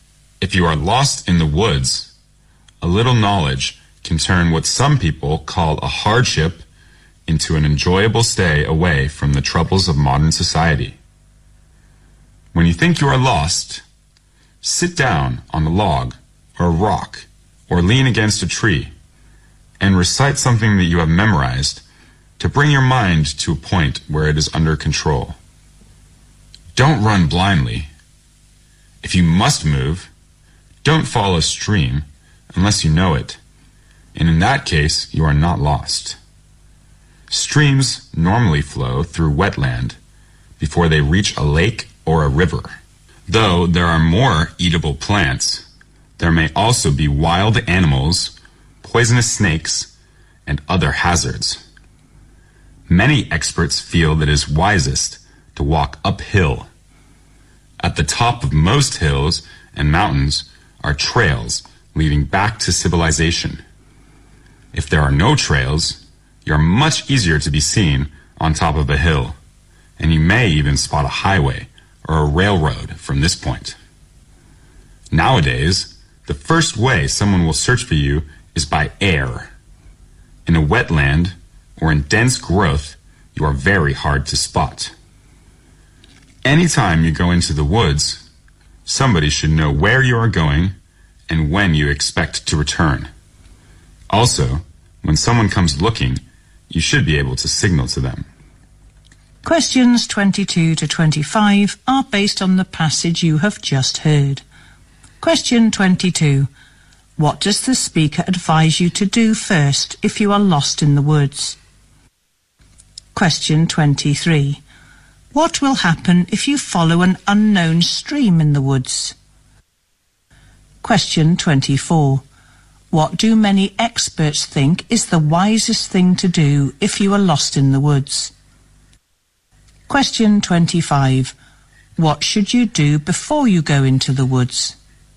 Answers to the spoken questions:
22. You should calm downand try to bring your mind under control.
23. You may come across wild animals, even poisonous snakes and other hazards.
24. To walk uphill
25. You should tell somebody else where you are going and when you are expected to return.